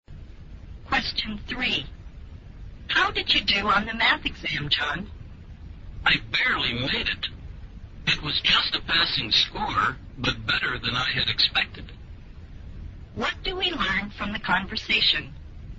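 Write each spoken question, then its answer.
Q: What do we learn from the conversation?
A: John barely passed the math exam, which was better than he had expected.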